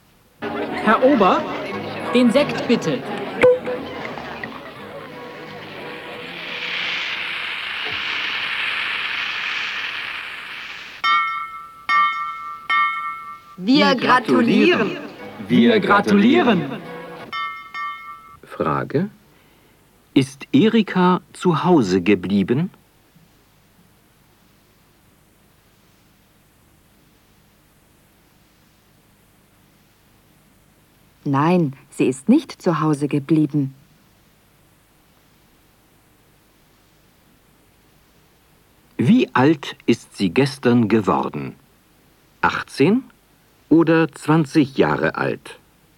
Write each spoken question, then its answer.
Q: Ist Erika zu Hause geblieben?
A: Nein, sie ist nicht zu Hause geblieben.